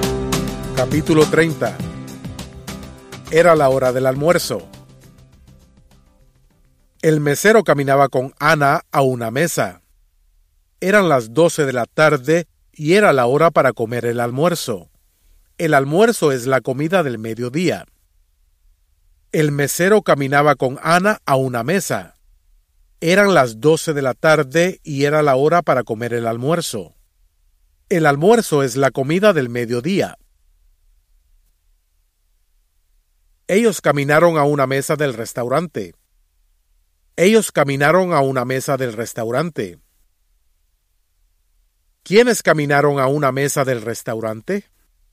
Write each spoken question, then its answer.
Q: ¿Quiénes caminaron a una mesa del restaurante?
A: ¡Perfecto! El mesero y Ana caminaron a una mesa del restaurante.